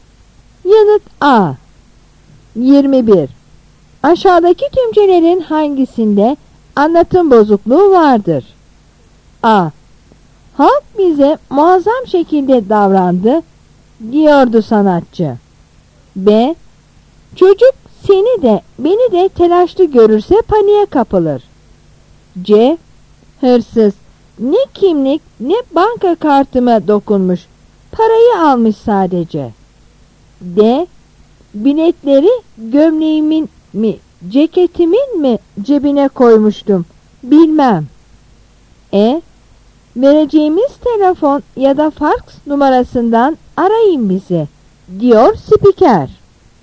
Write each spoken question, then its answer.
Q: Aşağıdaki tümcelerin hangisinde anlatım bozukluğu vardır?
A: Yanıt A.